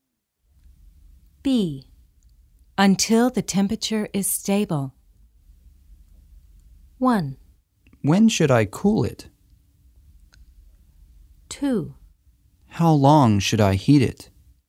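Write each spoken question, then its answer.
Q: Until the temperature is stable.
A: 2: How long should I heat it?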